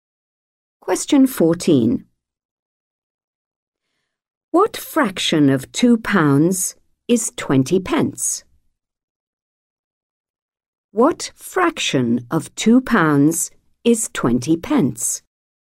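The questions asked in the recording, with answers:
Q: What fraction of 2 pounds is 20 pence?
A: 1/10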